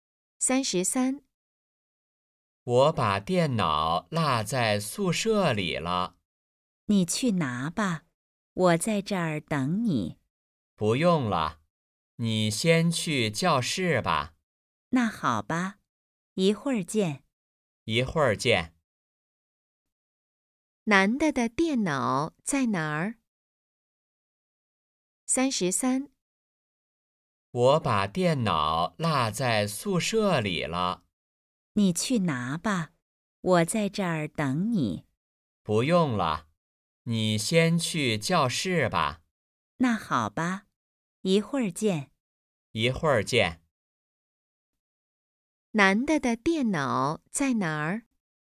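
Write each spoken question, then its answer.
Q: 男的的电脑在哪儿?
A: 宿舍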